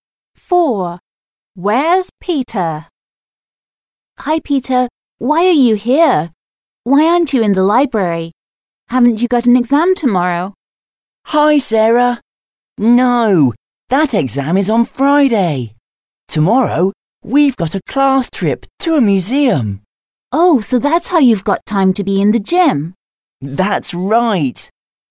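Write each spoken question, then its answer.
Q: Where's Peter?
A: In the gym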